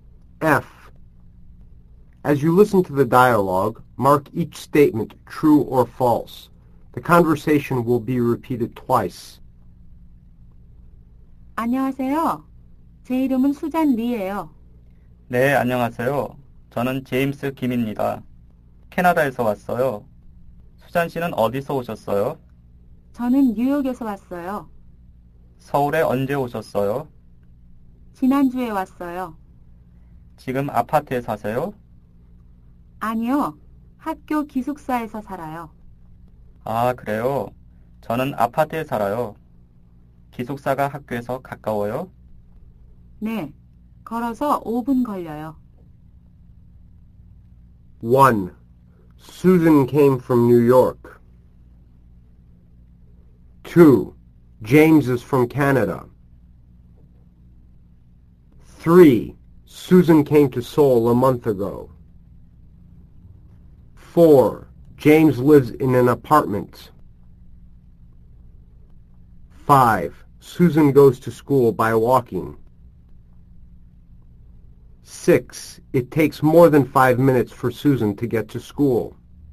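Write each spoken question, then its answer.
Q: Susan came from New York.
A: True

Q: James is from Canada.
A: True

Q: Susan came to Seoul a month ago.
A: False

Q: James lives in an apartment.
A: True

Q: Susan goes to school by walking.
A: True

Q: It takes more than 5 minutes for Susan to get to school.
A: False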